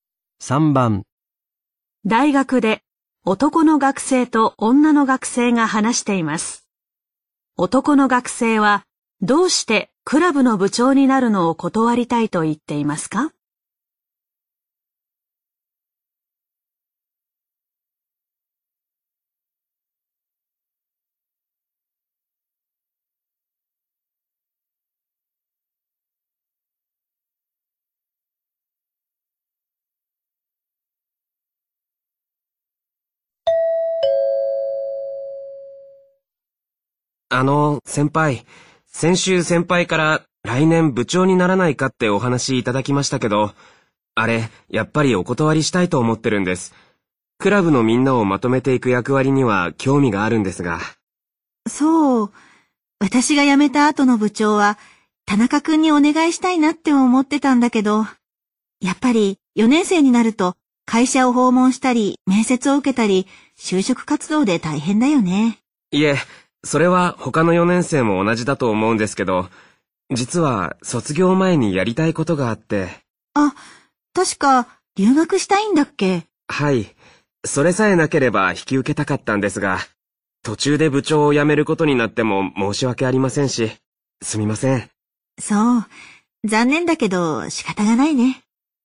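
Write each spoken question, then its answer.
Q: 男の学生はどうしてクラブの部長になるのを断りたいと言っていますか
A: 卒業前に留学したいから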